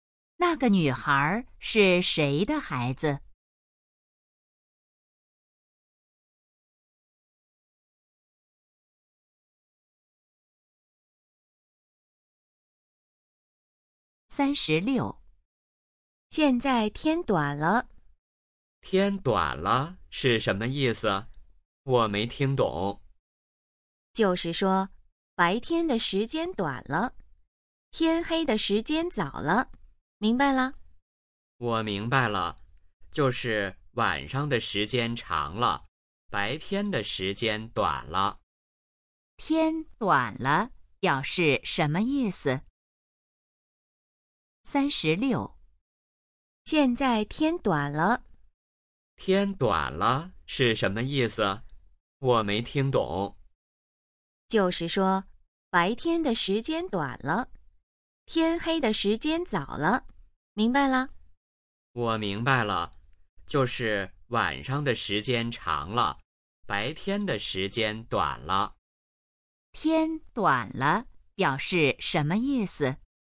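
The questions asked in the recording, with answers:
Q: 天短了表示什么意思?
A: 白天的时间短了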